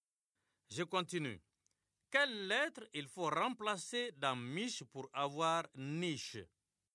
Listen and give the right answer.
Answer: Monsieur, c'est la lettre M.